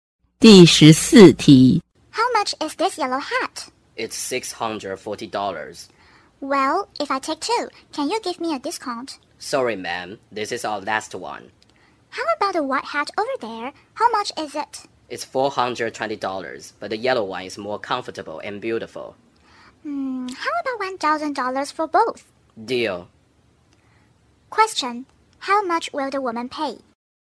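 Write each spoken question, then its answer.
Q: How much will the woman pay?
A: $1,000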